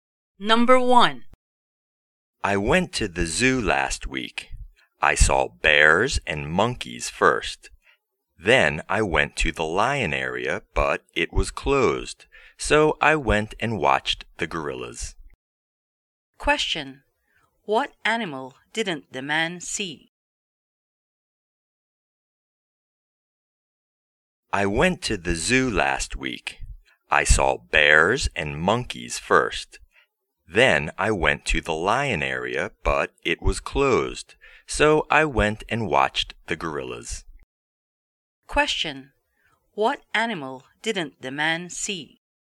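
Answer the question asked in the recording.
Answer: Lions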